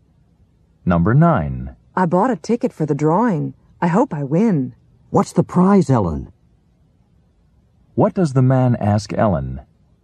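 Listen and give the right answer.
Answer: What the prize is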